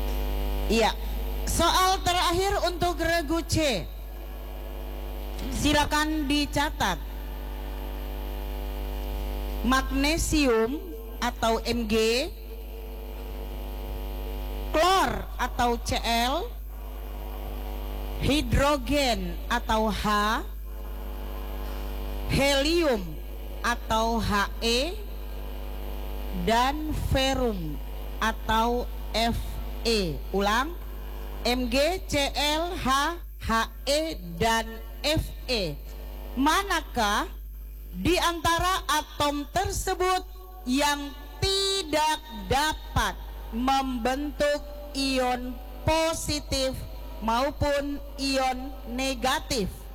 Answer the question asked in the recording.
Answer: Helium.